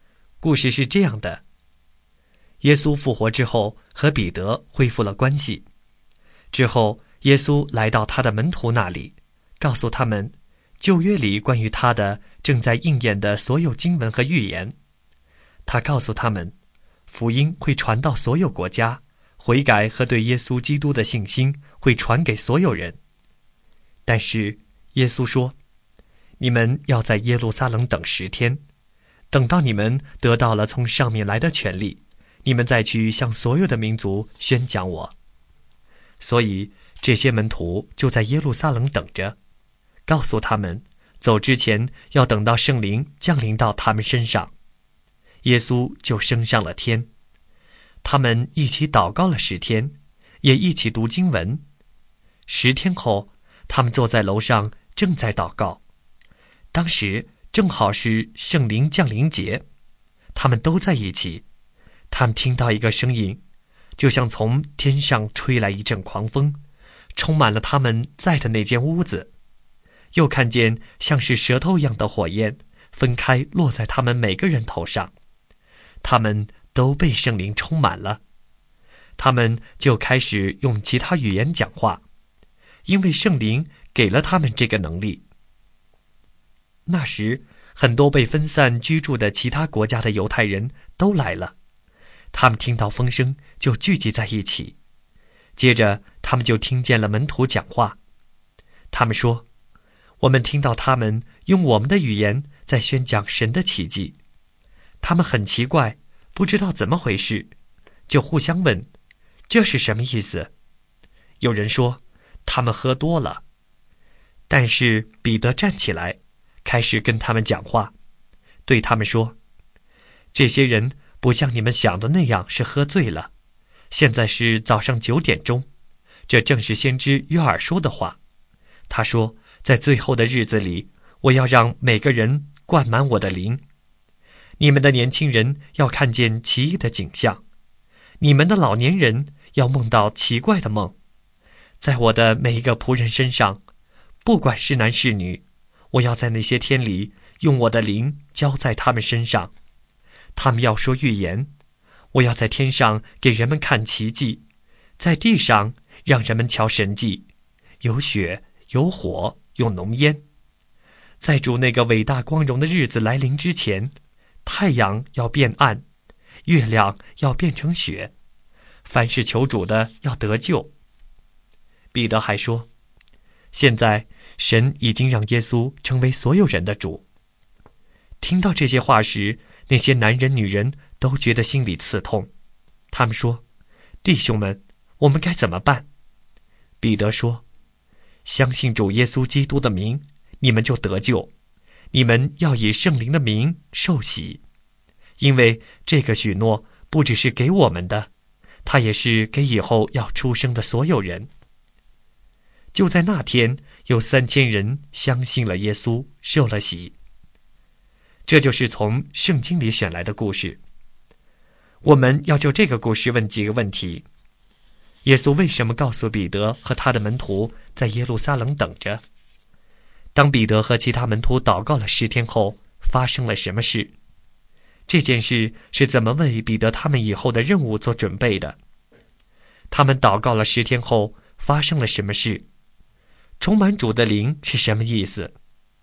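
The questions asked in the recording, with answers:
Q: 耶稣为什么告诉彼得和他的门徒在耶路撒冷等着?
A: 要等到他们得到从上面来的权力,也就是圣灵降临到他们身上,然后再去向所有民族宣讲耶稣

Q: 当彼得和其他门徒祷告了10天后,发生了什么事?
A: 从天上传来像狂风一样的声音,像舌头一样的火焰落在每个人头上,他们都被圣灵充满,开始用其他语言讲话

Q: 他们祷告了10天后,发生了什么事?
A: 他们被圣灵充满,开始用其他语言讲话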